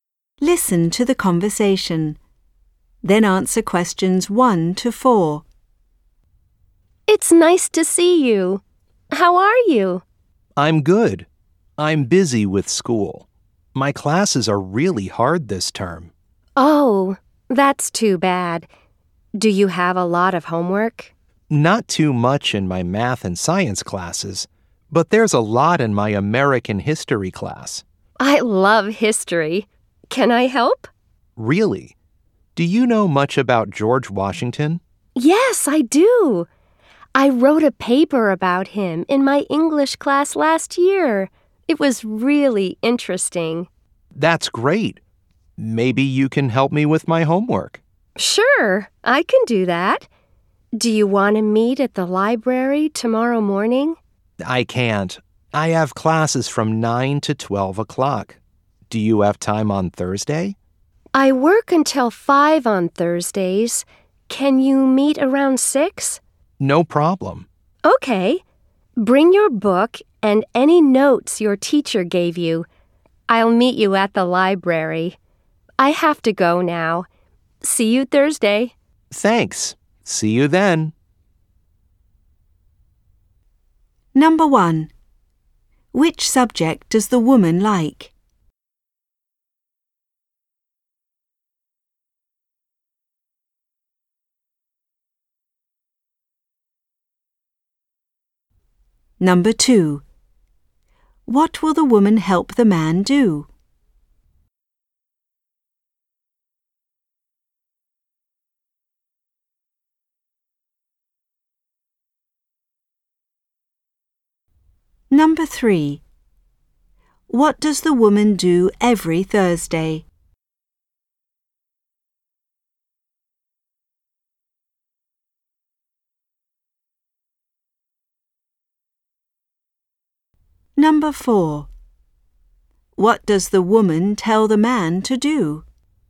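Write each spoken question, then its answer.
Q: Which subject does the woman like?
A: History

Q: What will the woman help the man do?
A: His American history homework (about George Washington)

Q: What does the woman do every Thursday?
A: She works until 5

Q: What does the woman tell the man to do?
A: Bring his book and his teacher's notes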